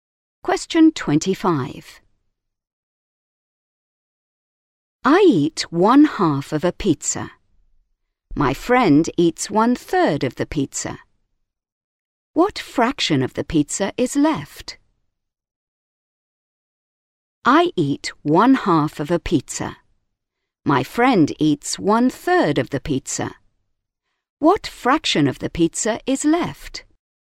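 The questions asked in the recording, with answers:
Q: What fraction of the pizza is left?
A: 1/6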